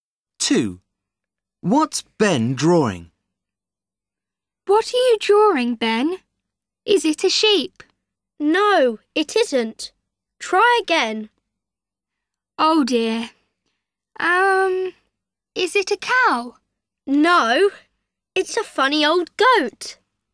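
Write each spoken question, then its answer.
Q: What's Ben drawing?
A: a goat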